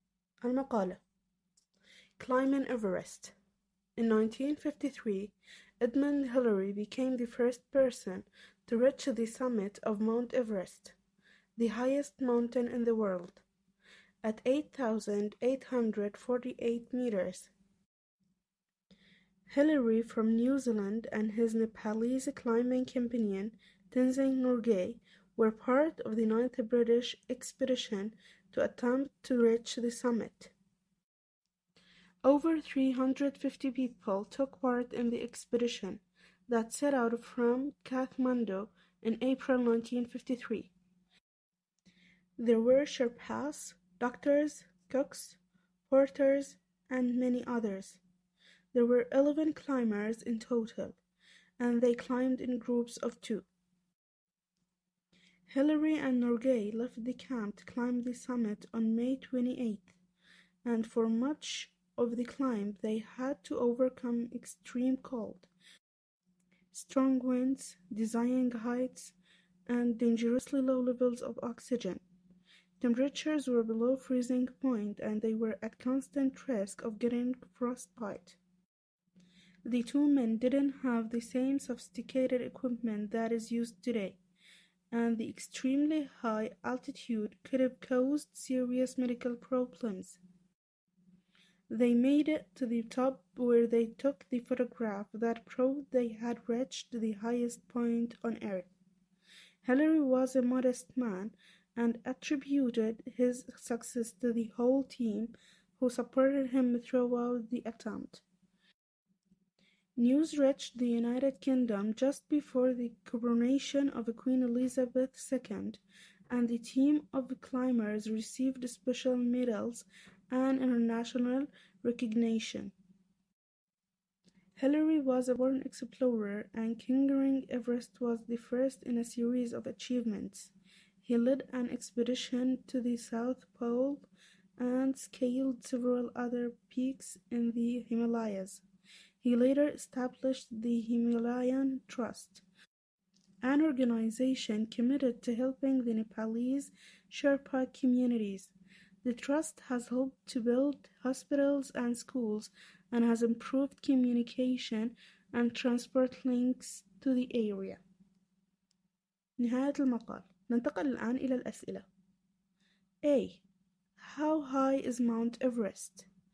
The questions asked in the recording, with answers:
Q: How high is Mount Everest?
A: 8,848 meters.